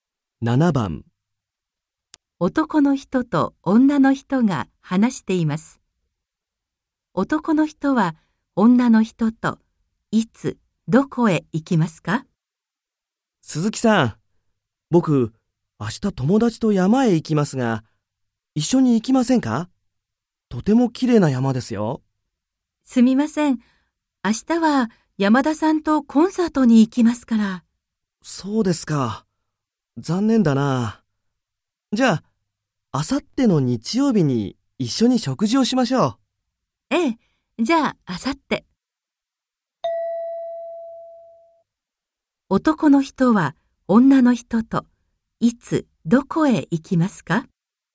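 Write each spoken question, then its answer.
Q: 男の人は女の人といつどこへ行きますか?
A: あさっての日曜日に食事に行きます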